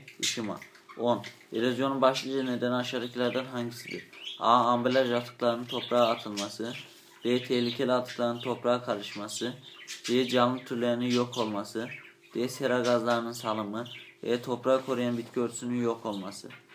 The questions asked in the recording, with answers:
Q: Erozyonun başlıca nedeni aşağıdakilerden hangisidir?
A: Doğru cevap E. Toprağı koruyan bitki örtüsünün yok olması.